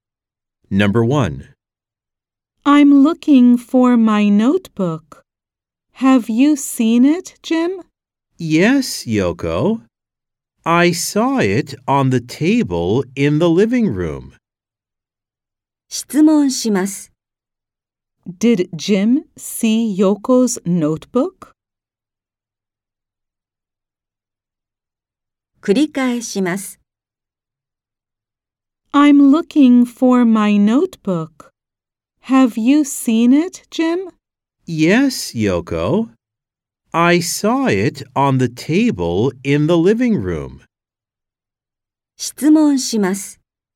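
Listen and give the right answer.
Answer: Yes, he did (on the table in the living room).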